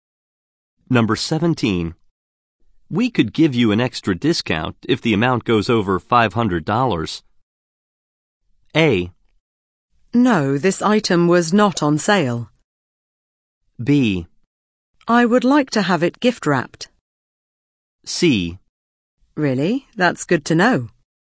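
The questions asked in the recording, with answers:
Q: We could give you an extra discount if the amount goes over $500.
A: C: Really? That's good to know.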